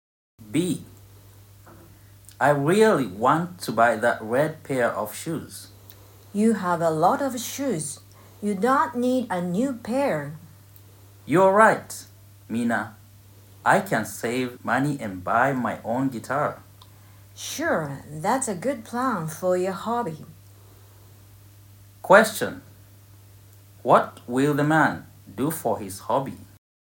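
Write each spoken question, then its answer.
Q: What will the man do for his hobby?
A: Save money and buy his own guitar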